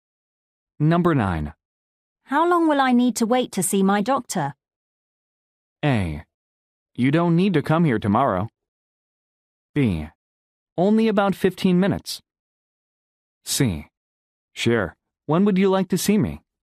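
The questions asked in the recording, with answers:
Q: How long will I need to wait to see my doctor?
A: B: Only about 15 minutes.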